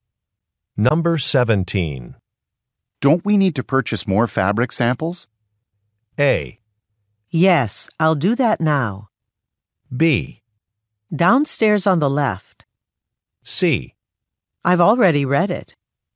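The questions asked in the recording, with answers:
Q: Don't we need to purchase more fabric samples?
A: A: Yes, I'll do that now.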